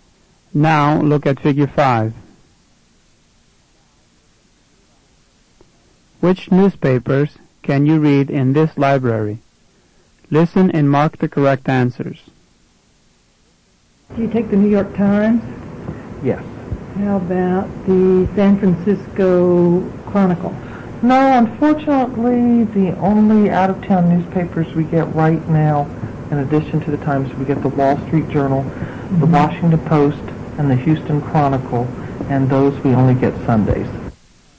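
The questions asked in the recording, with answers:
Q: Which newspapers can you read in this library?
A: The New York Times, the Wall Street Journal, the Washington Post and the Houston Chronicle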